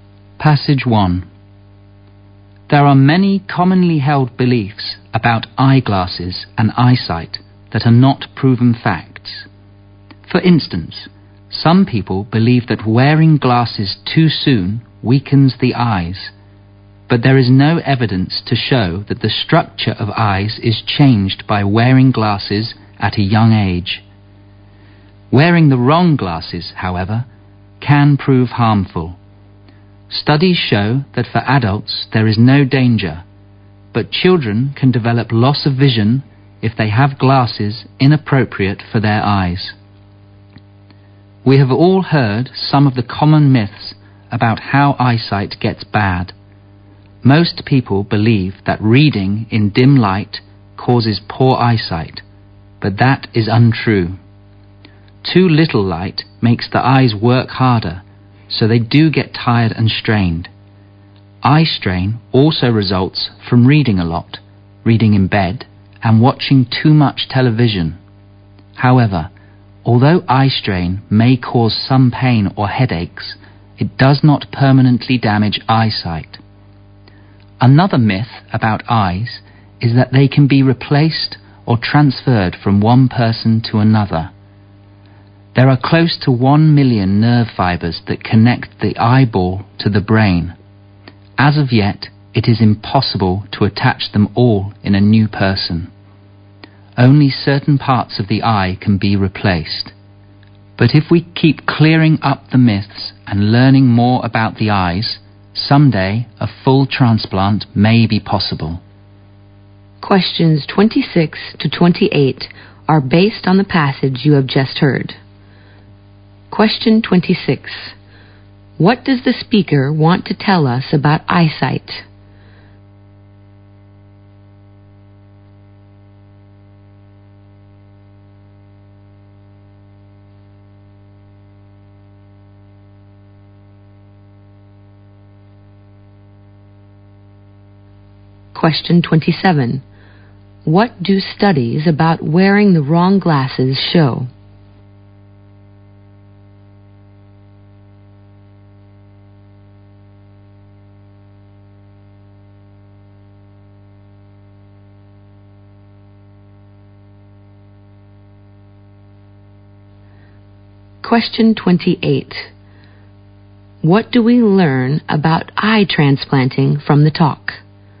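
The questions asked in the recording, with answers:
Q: What does the speaker want to tell us about eyesight?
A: Many common beliefs about it are myths, not facts.

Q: What do studies about wearing the wrong glasses show?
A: They can harm children's eyesight but not adults'.

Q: What do we learn about eye transplanting from the talk?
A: Only parts of the eye can be replaced now; a full transplant may be possible someday.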